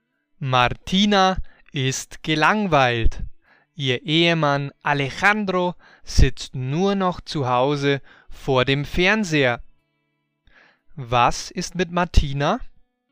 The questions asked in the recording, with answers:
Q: Was ist mit Martina?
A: Sie ist gelangweilt.